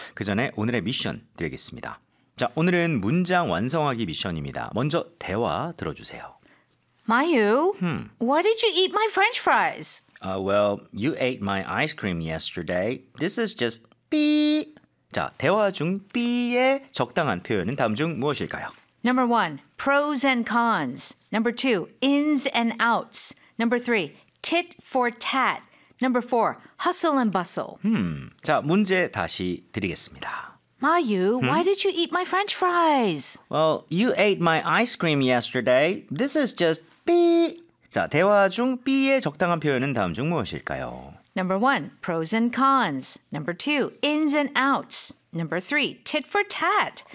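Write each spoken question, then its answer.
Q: 자, 대화 중 삐의 적당한 표현은 다음 중 무엇일까요?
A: 3: tit for tat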